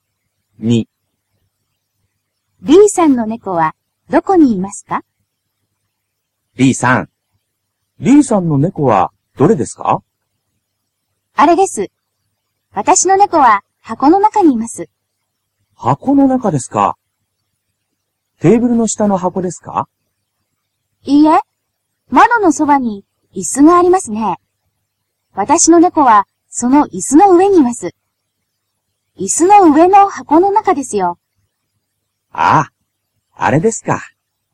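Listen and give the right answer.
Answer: 窓のそばの椅子の上の箱の中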